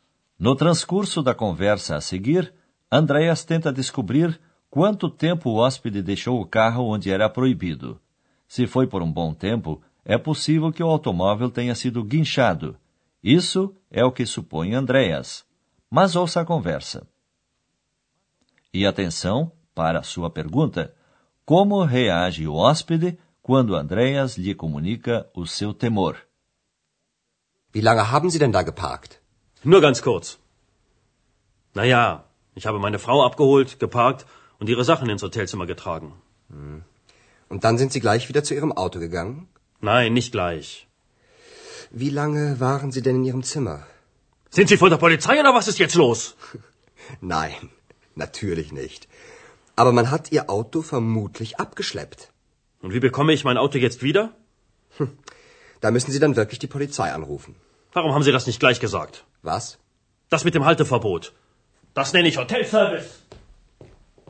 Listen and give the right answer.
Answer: O senhor descarregou toda a sua raiva pelo fato do auto ter sido guinchado em cima de Andreas.